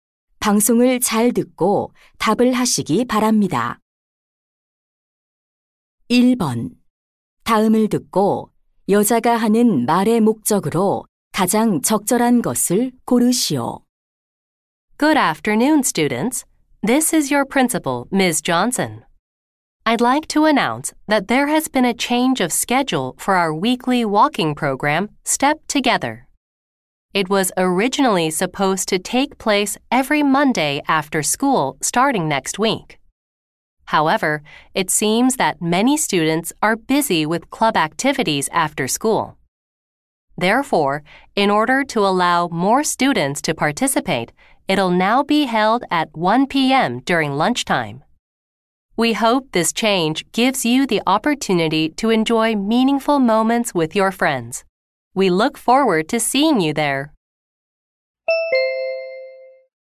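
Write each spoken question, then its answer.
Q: 다음을 듣고 여자가 하는 말의 목적으로 가장 적절한 것을 고르시오.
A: 걷기 프로그램 일정(시간) 변경을 안내하려고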